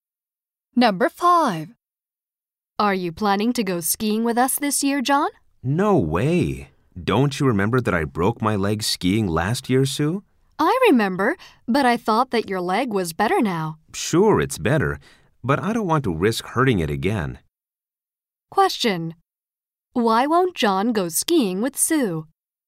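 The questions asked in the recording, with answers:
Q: Why won't John go skiing with Sue?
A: He doesn't want to risk hurting his leg again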